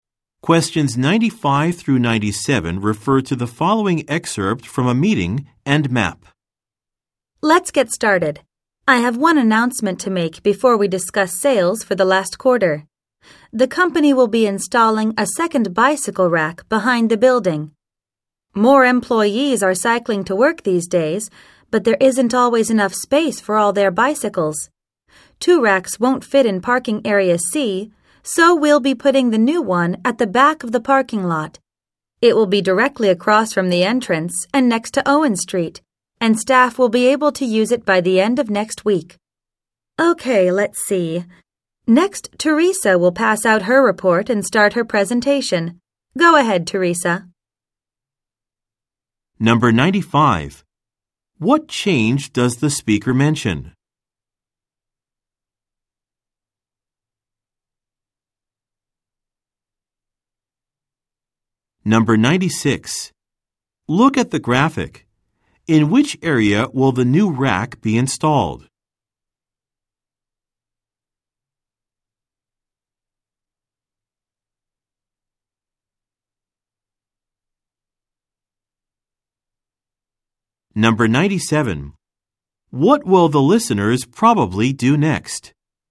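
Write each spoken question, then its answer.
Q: What change does the speaker mention?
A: A second bicycle rack will be installed behind the building.

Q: What will the listeners probably do next?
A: Receive Teresa's report and listen to her presentation.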